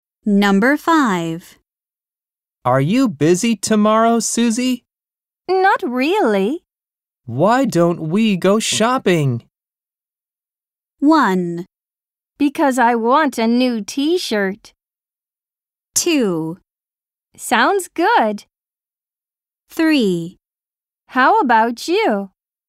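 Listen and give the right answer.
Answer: 2: Sounds good.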